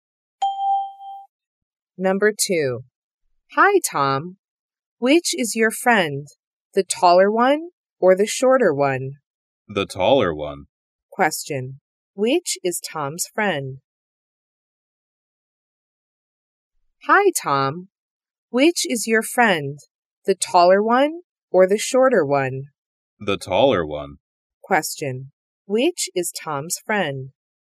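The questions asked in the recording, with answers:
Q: Which is Tom's friend?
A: The taller one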